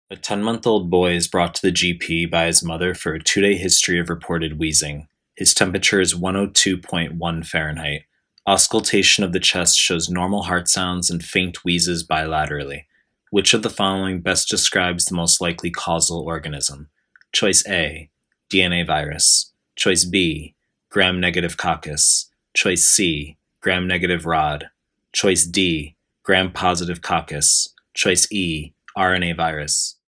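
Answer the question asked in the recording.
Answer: E: RNA virus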